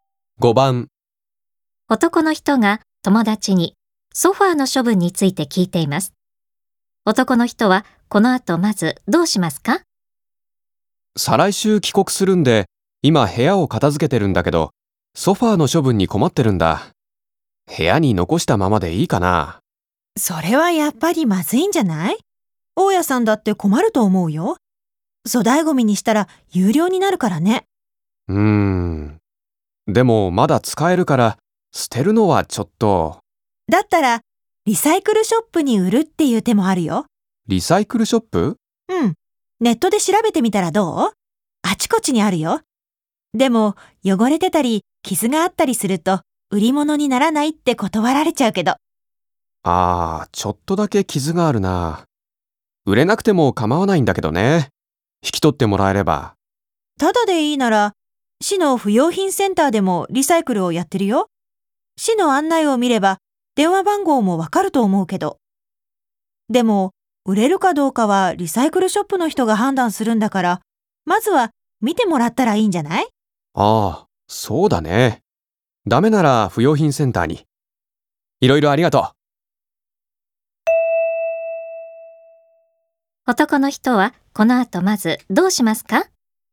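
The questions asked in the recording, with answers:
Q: 男の人はこの後まずどうしますか?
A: リサイクルショップにソファーを見てもらう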